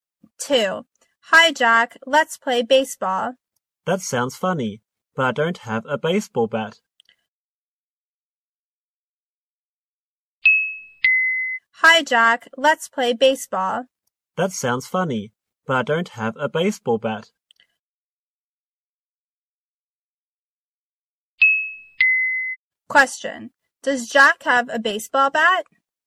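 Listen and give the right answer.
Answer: No, he doesn't.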